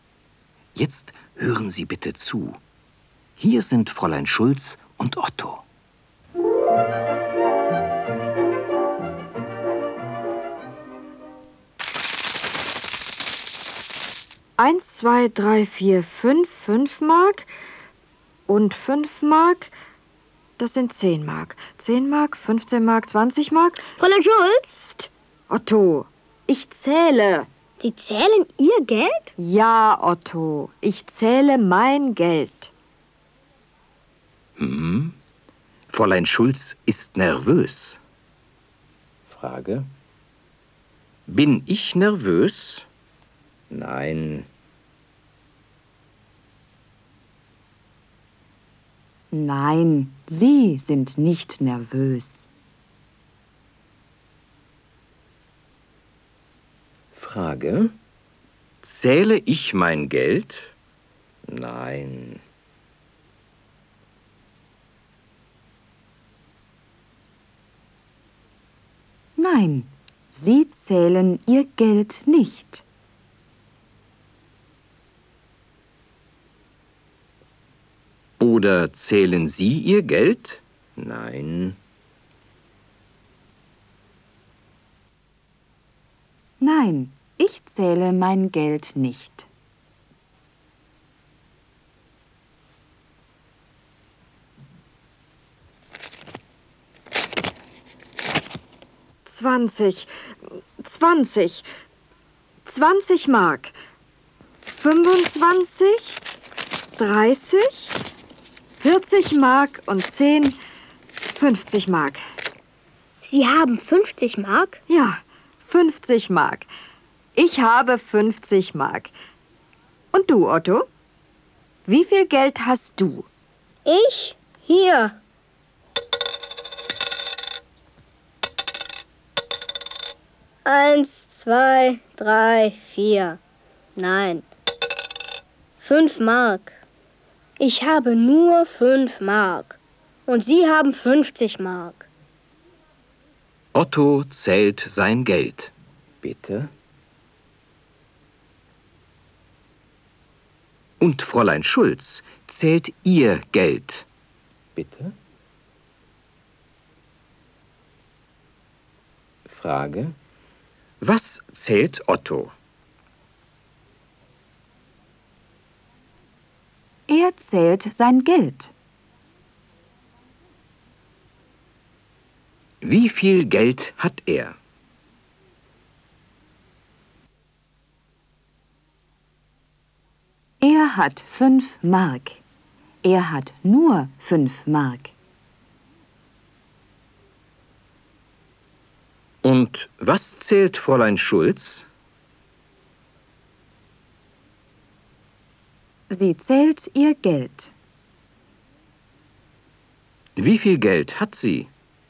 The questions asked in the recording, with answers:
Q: Was zählt Otto?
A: Er zählt sein Geld.

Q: Wie viel Geld hat er?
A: Er hat 5 Mark. Er hat nur 5 Mark.

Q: Wie viel Geld hat sie?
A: Sie hat 50 Mark.